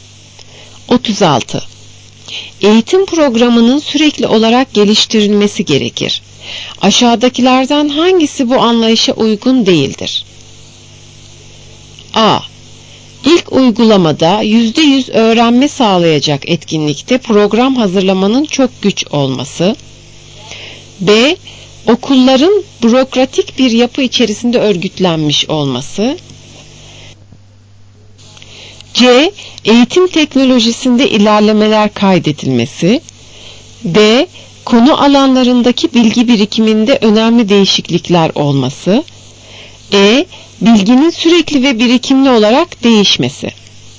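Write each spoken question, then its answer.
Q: Aşağıdakilerden hangisi bu anlayışa uygun değildir?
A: B: Okulların bürokratik bir yapı içerisinde örgütlenmiş olması.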